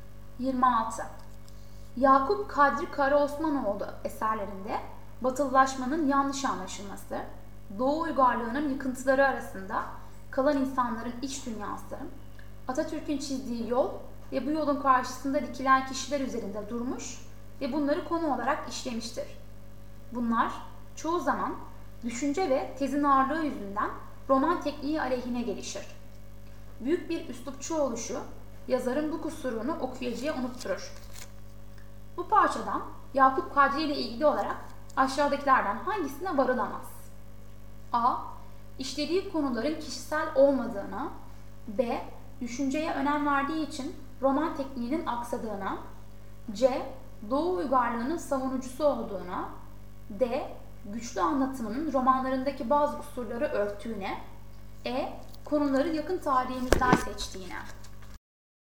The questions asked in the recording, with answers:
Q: Bu parçadan Yakup Kadri ile ilgili olarak aşağıdakilerden hangisine varılamaz?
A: Doğru yanıt C.